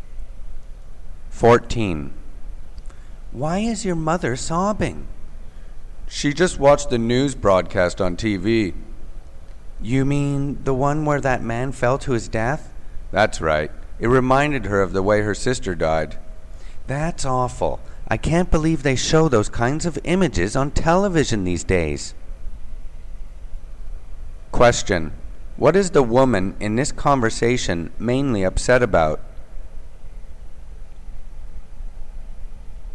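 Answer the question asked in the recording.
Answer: Disturbing images shown on TV news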